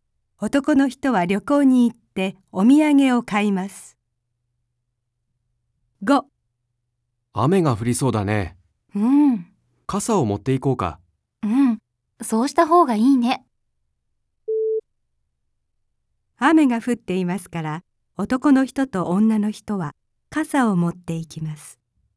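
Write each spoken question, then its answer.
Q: 雨が降っていますから、男の人と女の人は傘を持っていきます。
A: ×(まだ降っていない)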